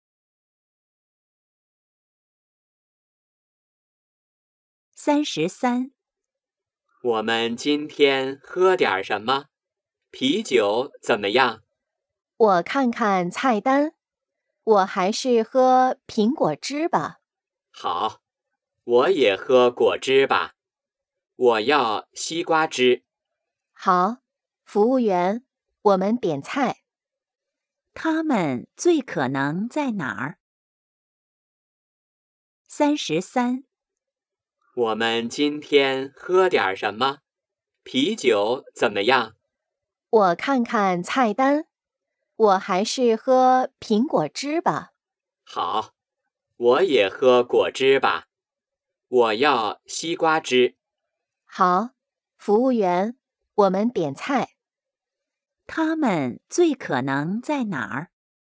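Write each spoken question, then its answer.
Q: 他们最可能在哪儿?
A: 饭馆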